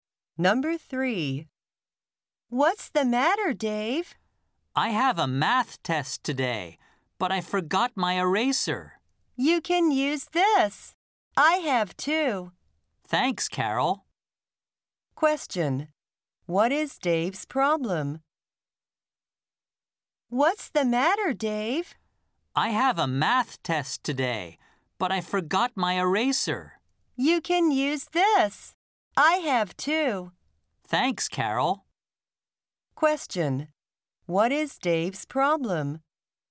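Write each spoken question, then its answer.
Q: What is Dave's problem?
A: He forgot his eraser.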